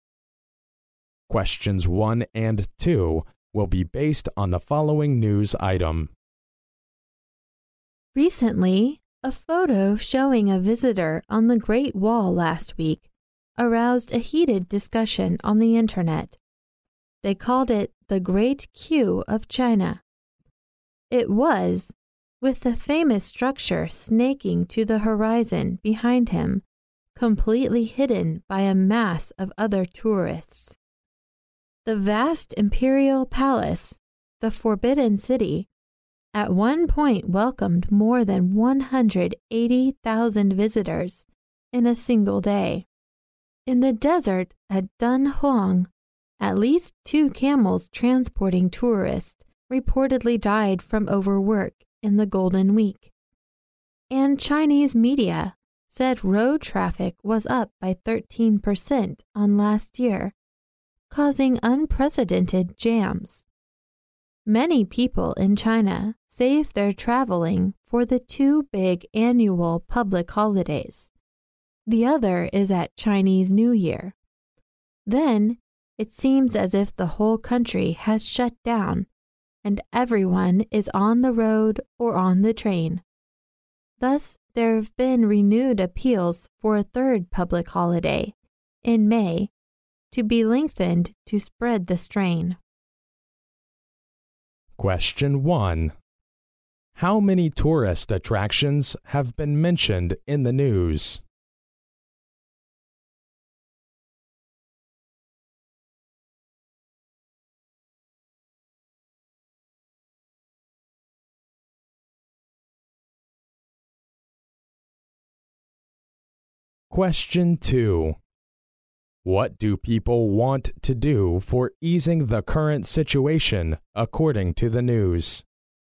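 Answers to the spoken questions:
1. Three (the Great Wall, the Forbidden City and Dunhuang)
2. Lengthen a third public holiday in May to spread the strain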